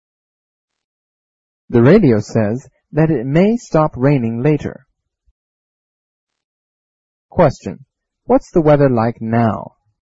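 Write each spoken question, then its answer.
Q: What's the weather like now?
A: It's raining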